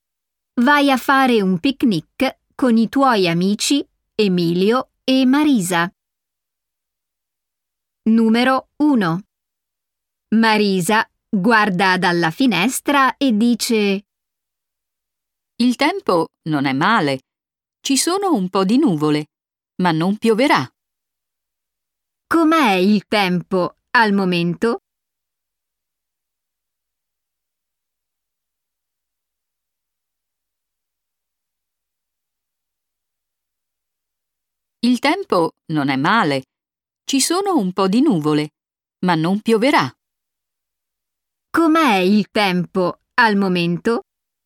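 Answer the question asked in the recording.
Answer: Ci sono un po' di nuvole, ma non pioverà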